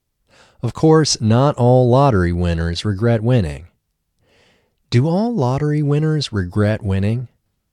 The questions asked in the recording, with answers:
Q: Do all lottery winners regret winning?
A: No, of course, not all lottery winners regret winning.